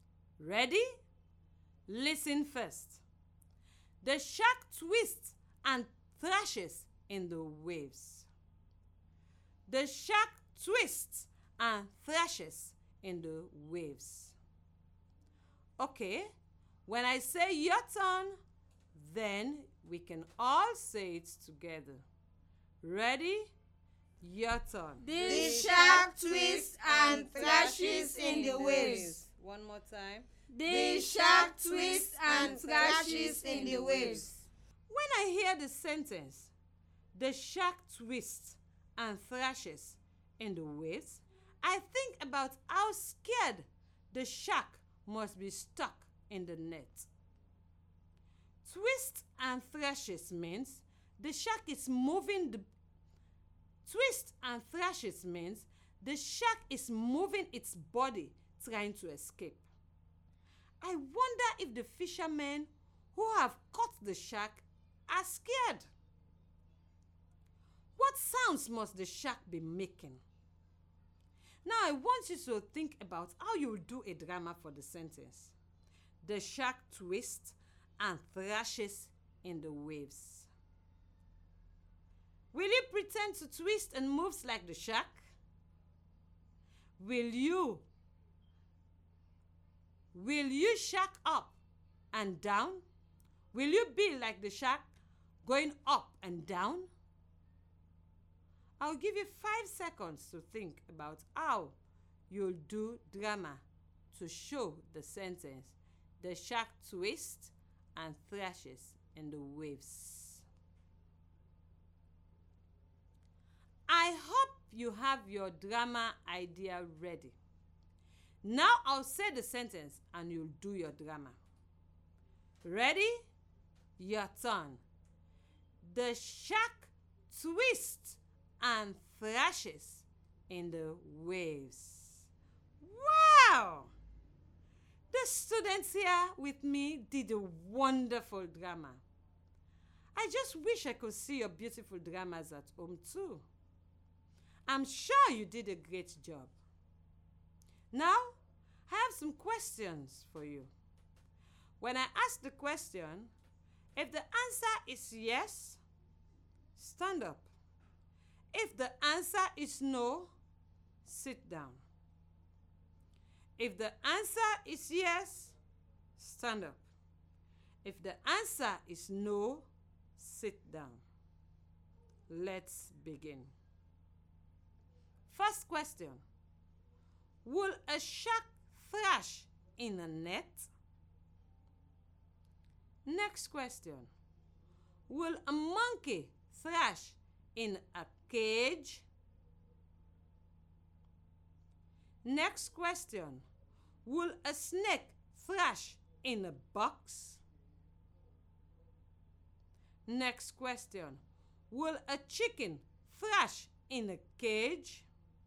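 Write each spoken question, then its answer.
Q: Will a shark thrash in a net?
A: Yes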